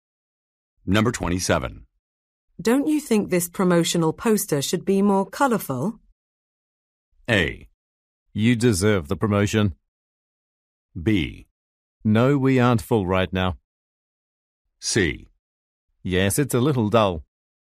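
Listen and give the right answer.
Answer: C: Yes, it's a little dull.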